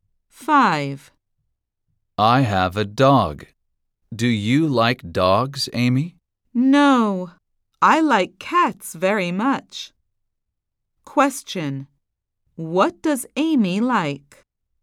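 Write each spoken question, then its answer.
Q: What does Amy like?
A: cats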